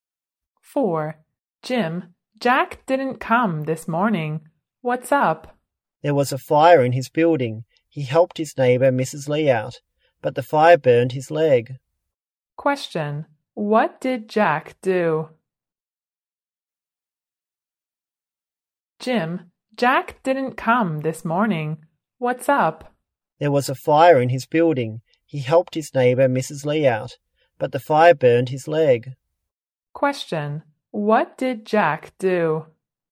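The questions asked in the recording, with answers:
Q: What did Jack do?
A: He helped his neighbor Mrs. Lee out of a fire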